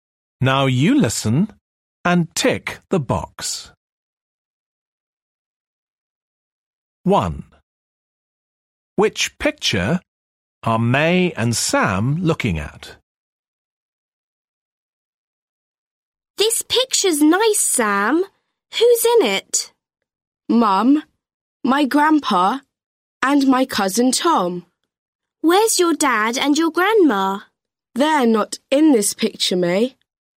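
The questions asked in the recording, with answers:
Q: Which picture are May and Sam looking at?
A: The one with Sam's mum, grandpa and cousin Tom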